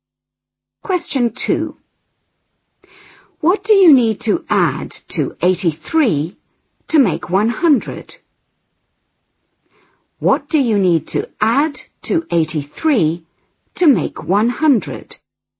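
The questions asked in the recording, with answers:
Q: What do you need to add to 83 to make 100?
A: 17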